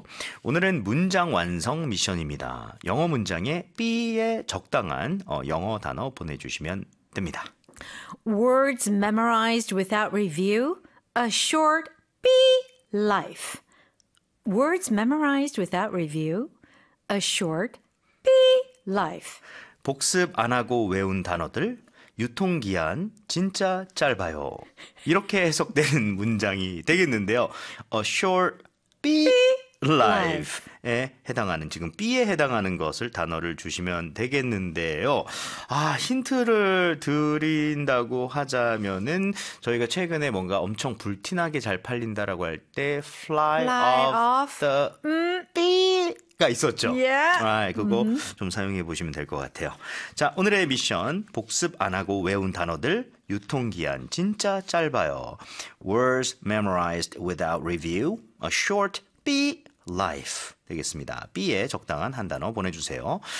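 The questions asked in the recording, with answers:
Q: Words memorized without review. A short B life 되겠습니다. B에 적당한 한 단어 보내주세요.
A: shelf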